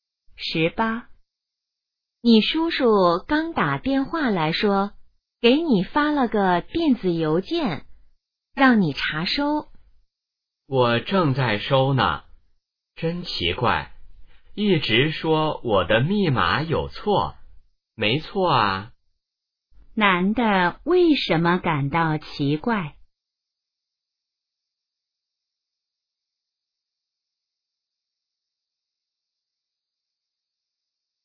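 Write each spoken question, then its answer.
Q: 男的为什么感到奇怪?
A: 一直说他的密码有错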